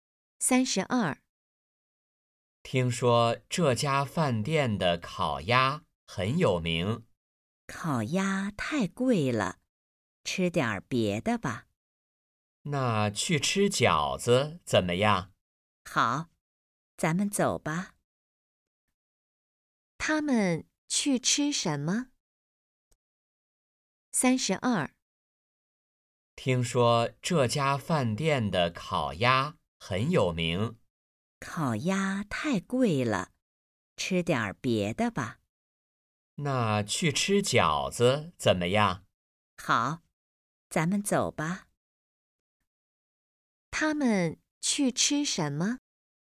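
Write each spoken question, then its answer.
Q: 他们去吃什么?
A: 饺子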